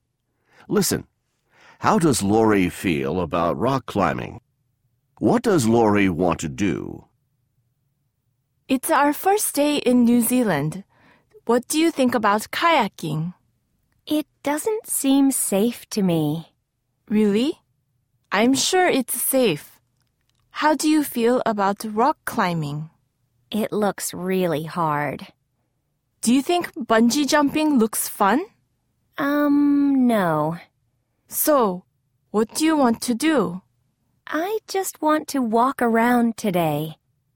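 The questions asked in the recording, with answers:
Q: How does Lori feel about rock climbing?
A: She thinks it looks really hard.

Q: What does Lori want to do?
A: She just wants to walk around today.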